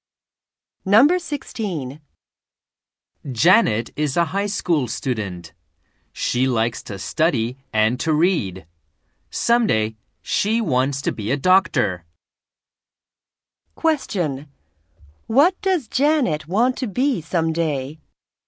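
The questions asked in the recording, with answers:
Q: What does Janet want to be someday?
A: A doctor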